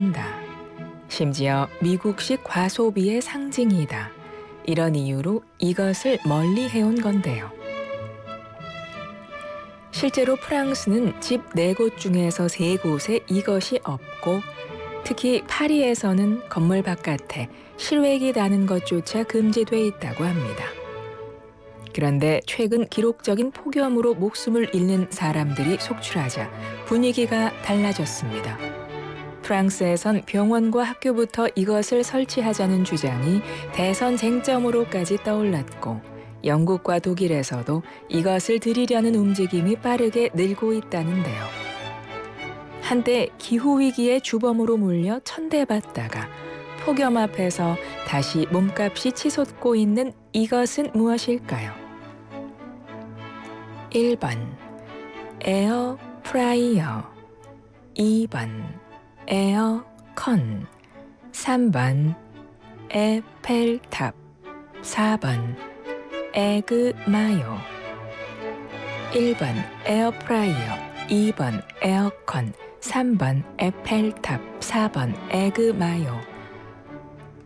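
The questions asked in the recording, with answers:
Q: 한때 기후위기의 주범으로 몰려 천대받다가 폭염 앞에서 다시 몸값이 치솟고 있는 이것은 무엇일까요?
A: 2번: 에어컨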